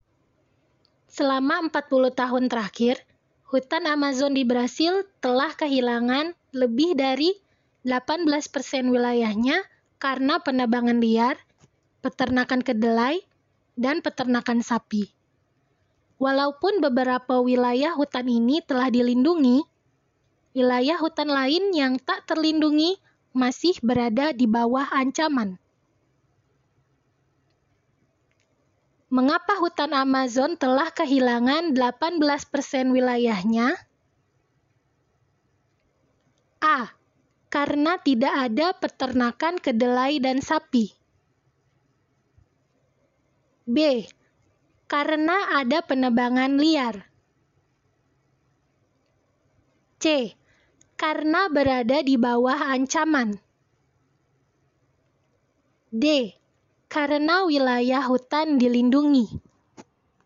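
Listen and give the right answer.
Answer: B: Karena ada penebangan liar.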